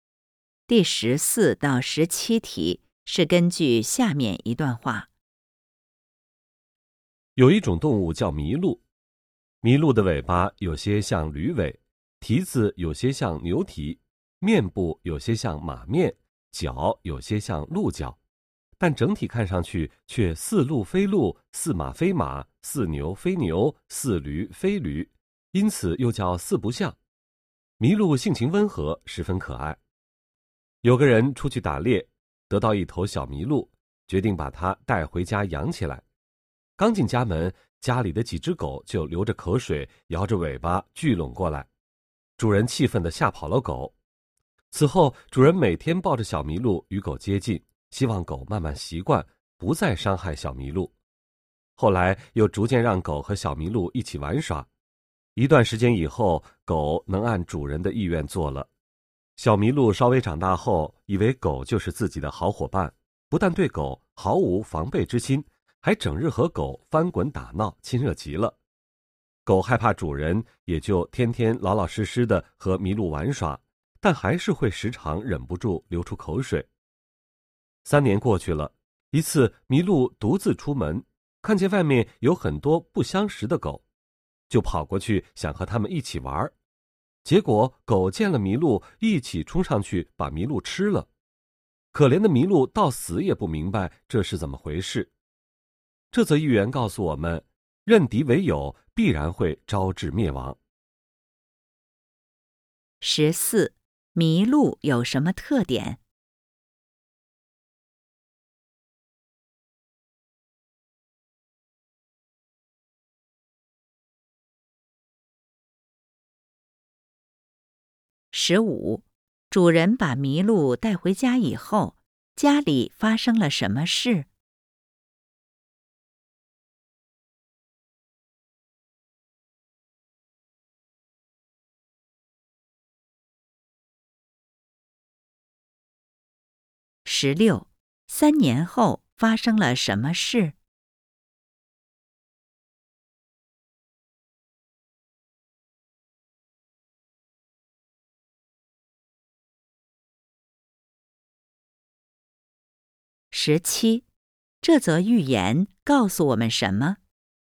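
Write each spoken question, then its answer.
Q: 主人把麋鹿带回家以后,家里发生了什么事?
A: 家里的狗流着口水想吃它,主人吓跑了狗

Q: 三年后发生了什么事?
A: 麋鹿被外面不相识的狗吃了

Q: 这则寓言告诉我们什么?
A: 认敌为友必然会招致灭亡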